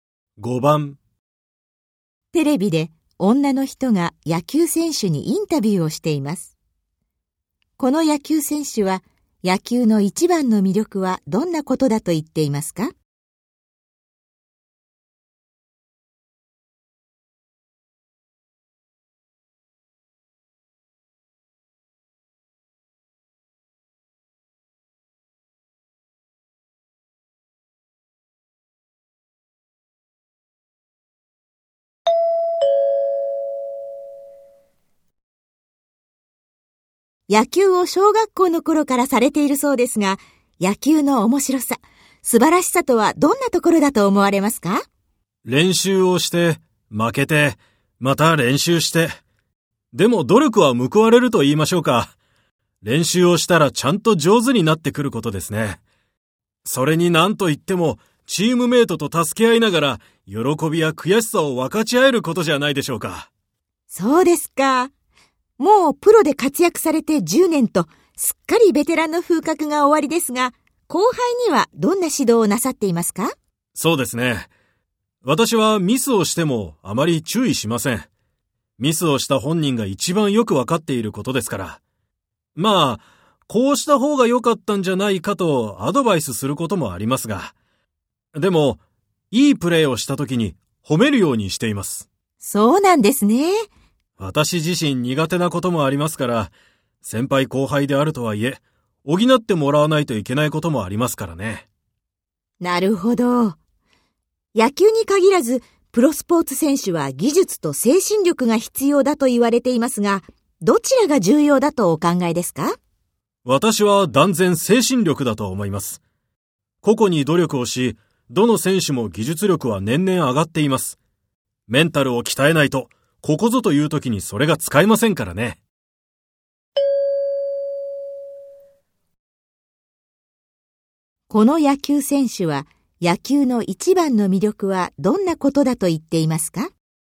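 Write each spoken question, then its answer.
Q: この野球選手は野球の一番の魅力はどんなことだと言っていますか?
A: チームメイトと助け合いながら、喜びや悔しさを分かち合えること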